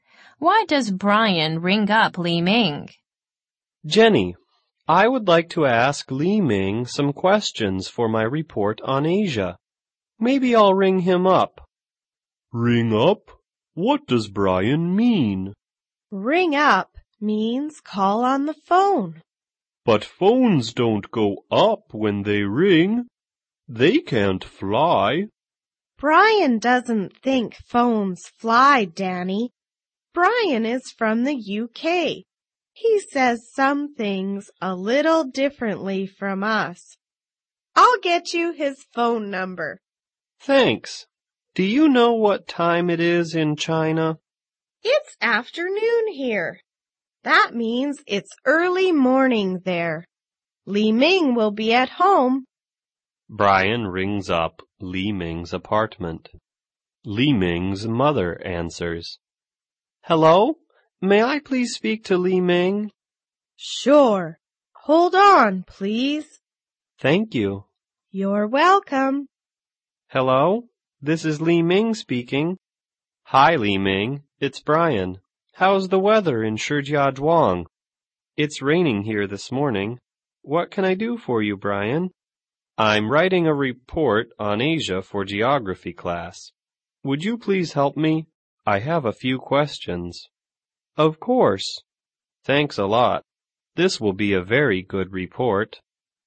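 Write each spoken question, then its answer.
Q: Why does Brian ring up Li Ming?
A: To ask Li Ming some questions for his report on Asia.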